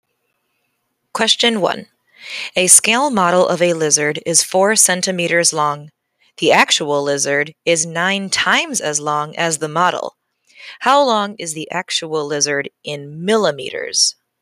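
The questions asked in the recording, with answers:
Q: How long is the actual lizard in millimeters?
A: 360 millimeters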